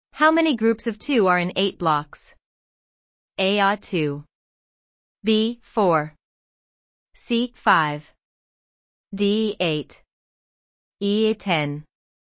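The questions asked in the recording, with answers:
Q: How many groups of two are in 8 blocks?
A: B: 4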